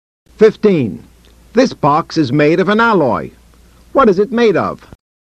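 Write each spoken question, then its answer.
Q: What is it made of?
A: An alloy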